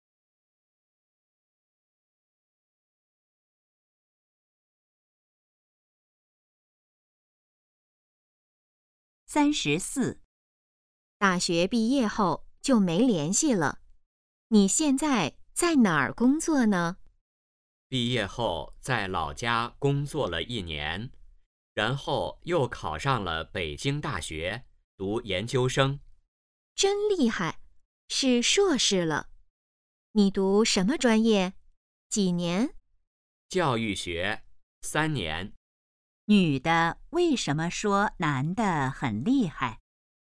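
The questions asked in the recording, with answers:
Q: 女的为什么说男的很厉害?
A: 他考上北京大学读研究生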